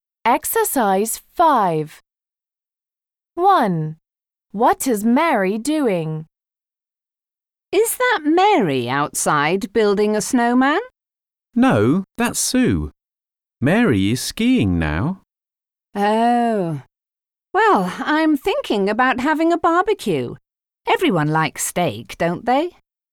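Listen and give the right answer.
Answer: Skiing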